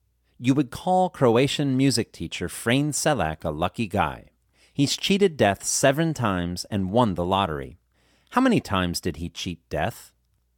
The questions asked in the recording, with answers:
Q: How many times did he cheat death?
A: He cheated death 7 times.